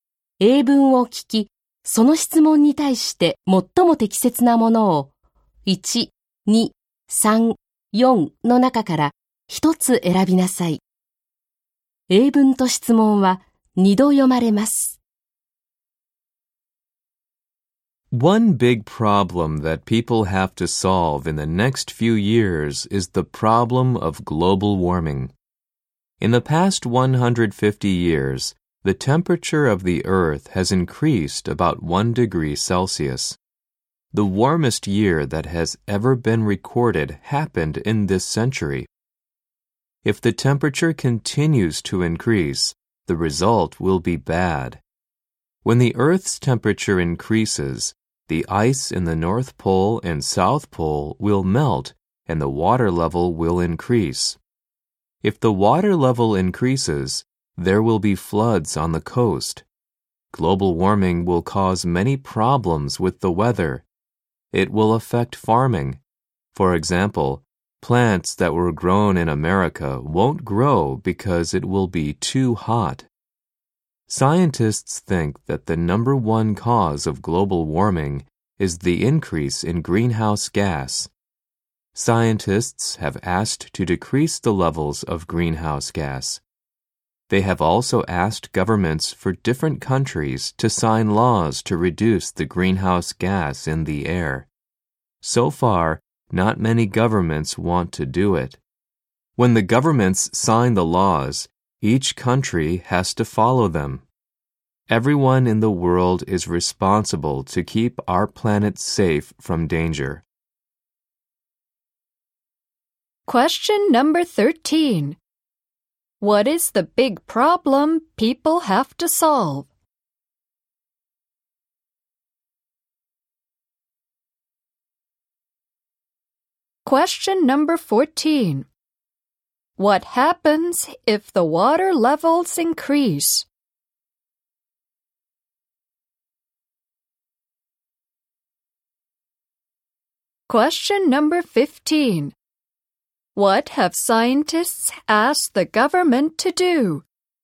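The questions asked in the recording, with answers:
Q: What is the big problem people have to solve?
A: Global warming

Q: What happens if the water levels increase?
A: There will be floods on the coast

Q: What have scientists asked the government to do?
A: Sign laws to reduce the greenhouse gas in the air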